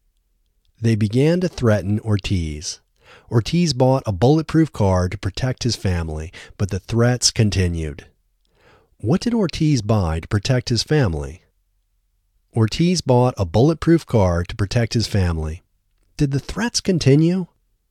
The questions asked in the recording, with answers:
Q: What did Ortiz buy to protect his family?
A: Ortiz bought a bulletproof car to protect his family.

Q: Did the threats continue?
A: Yes, the threats continued.